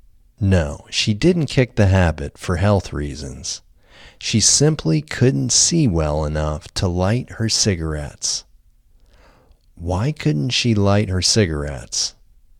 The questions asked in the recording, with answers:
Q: Why couldn't she light her cigarettes?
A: She couldn't see well enough to light her cigarettes.